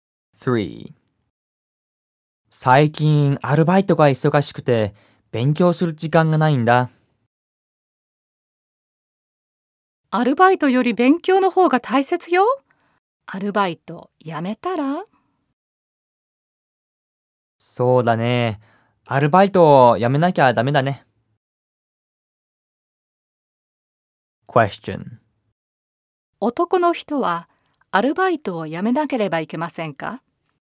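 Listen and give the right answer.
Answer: はい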